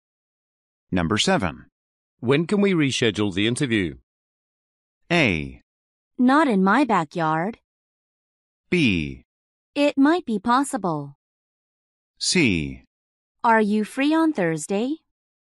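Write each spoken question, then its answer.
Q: When can we reschedule the interview?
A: C: Are you free on Thursday?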